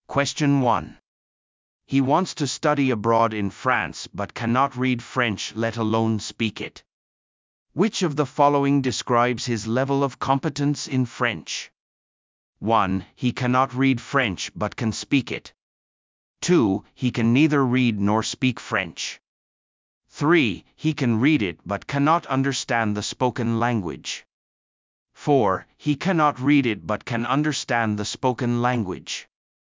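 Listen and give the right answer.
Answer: 2: He can neither read nor speak French.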